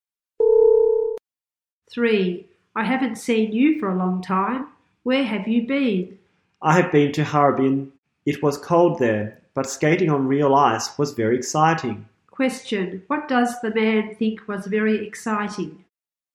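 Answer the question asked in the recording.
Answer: Skating on real ice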